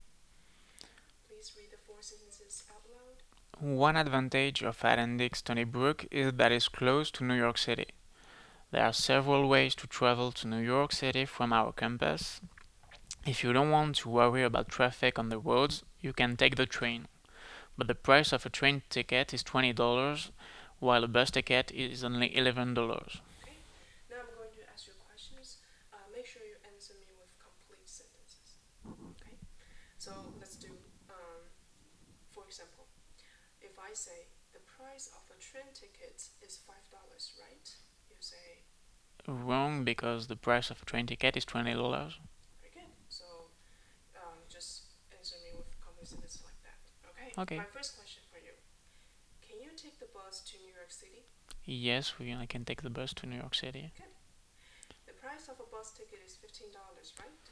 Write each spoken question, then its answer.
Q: The price of a bus ticket is $15, right?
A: Wrong. The price of a bus ticket is only $11.